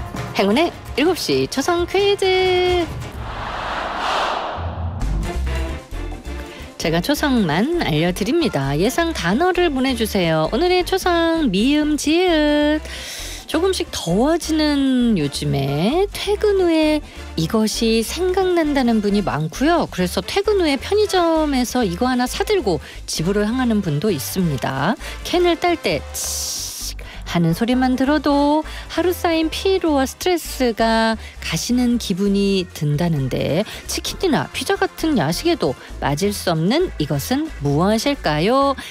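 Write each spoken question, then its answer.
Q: 캔을 딸 때 하는 소리만 들어도 하루 쌓인 피로와 스트레스가 가시는 기분이 든다는데 치킨이나 피자 같은 야식에도 맞을 수 없는 이것은 무엇일까요?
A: 맥주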